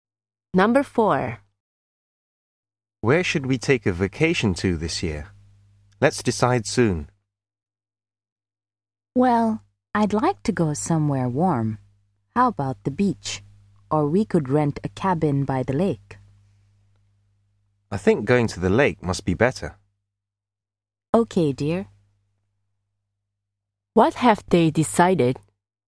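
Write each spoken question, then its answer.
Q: What have they decided?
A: To rent a cabin by the lake for their vacation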